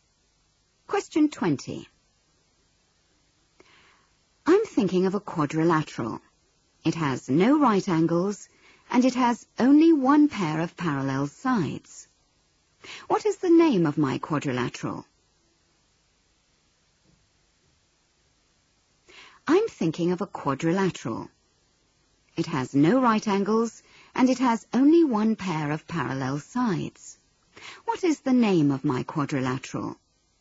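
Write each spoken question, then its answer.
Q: What is the name of my quadrilateral?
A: Trapezium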